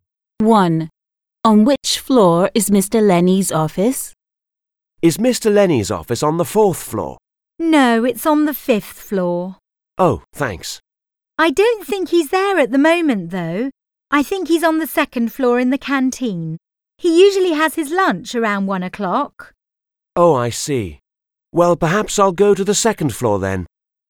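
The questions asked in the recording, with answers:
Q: On which floor is Mr. Lenny's office?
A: the fifth floor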